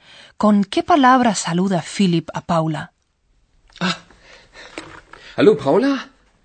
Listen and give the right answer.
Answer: Philipp elige para saludarla la palabra hola, que es de carácter amistoso.